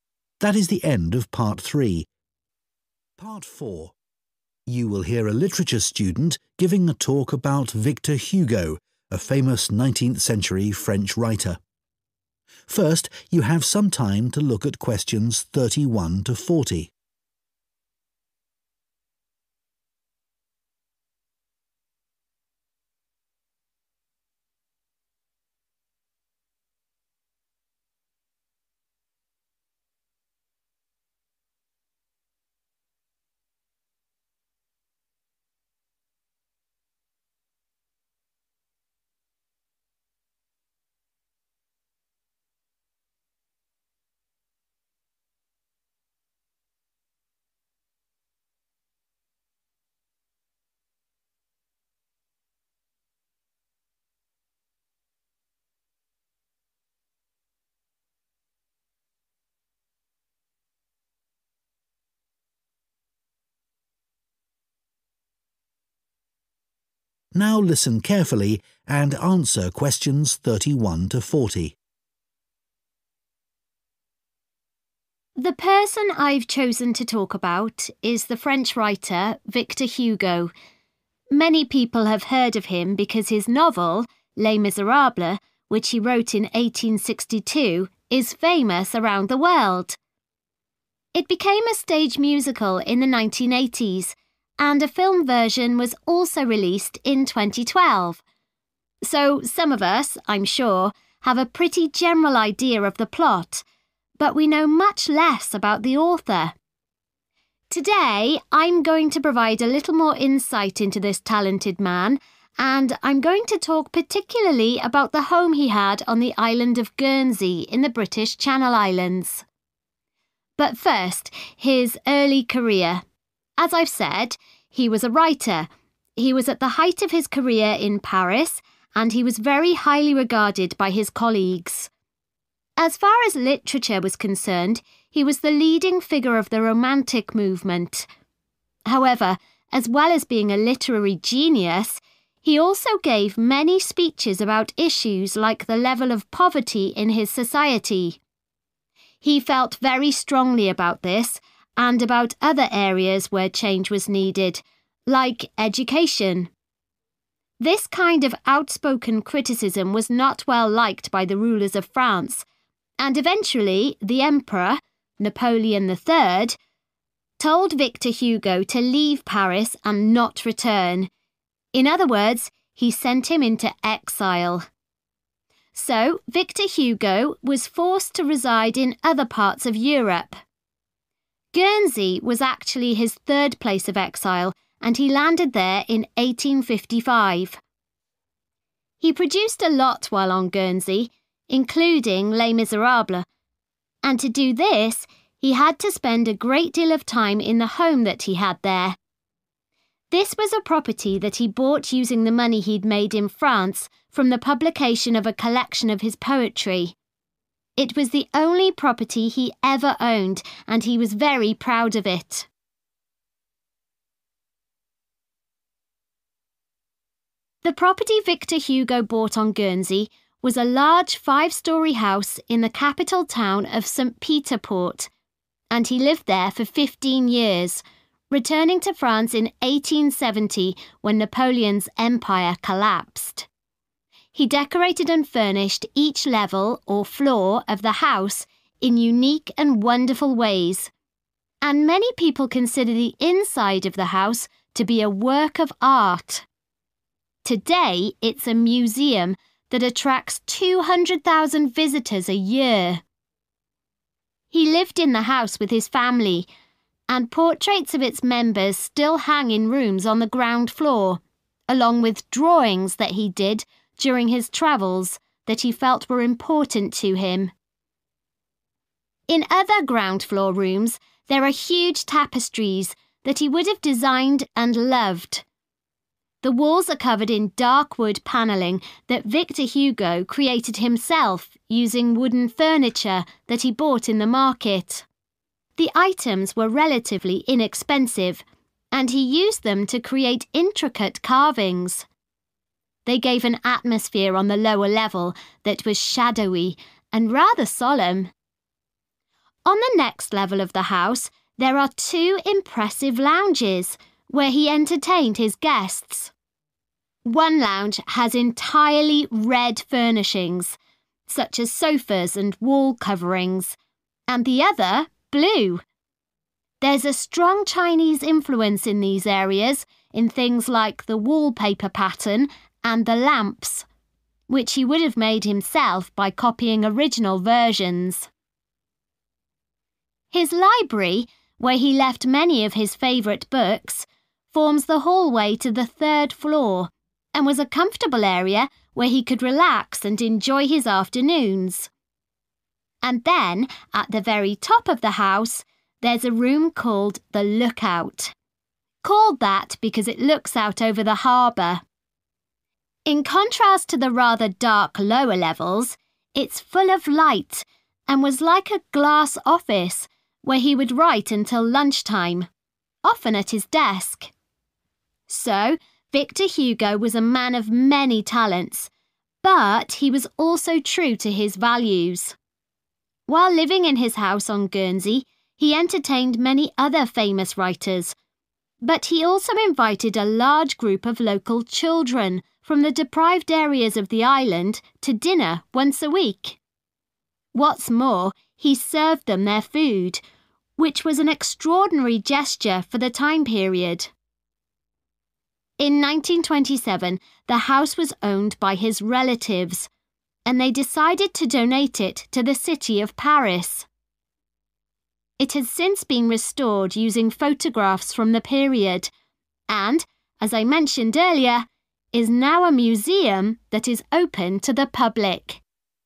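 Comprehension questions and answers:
Complete the notes below.Write ONE WORD ONLY for each answer.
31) We know more about its overall 31 ....... than about its author.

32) He spoke publicly about social issues, such as 32 ...... and education.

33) Victor Hugo had to live elsewhere in 33 .....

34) He used his income from the sale of some 34 ...... he had written to buy a house on Guernsey.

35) The ground floor contains portraits, 35 ...... and tapestries that he valued.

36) He bought cheap 36 ...... made of wood and turned this into beautiful wall carvings.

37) The first floor consists of furnished areas with wallpaper and 37 ...... that have a Chinese design.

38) He wrote in a room at the top of the house that had a view of the 38 ...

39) He entertained other writers as well as poor 39 ..... in his house.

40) Victor Hugo's 40 ...... gave ownership of the house to the city of Paris in 1927.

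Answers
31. plot
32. poverty
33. Europe
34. poetry
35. drawings
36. furniture
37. lamps
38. harbour
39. children
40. relatives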